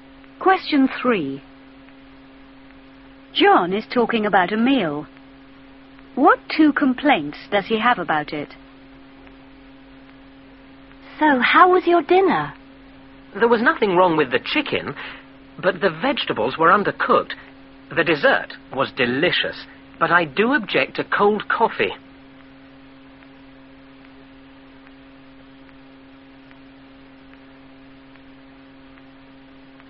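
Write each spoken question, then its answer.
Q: What 2 complaints does he have about it?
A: The vegetables were undercooked and the coffee was cold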